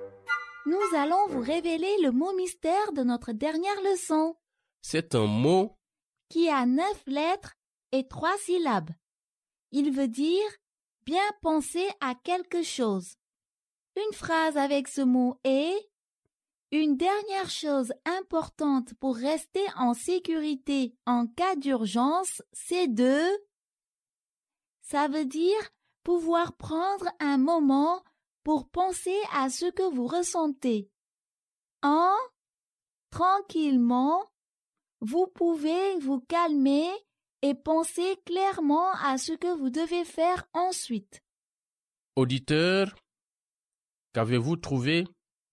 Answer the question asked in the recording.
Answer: Le mot mystère d'aujourd'hui est réfléchir.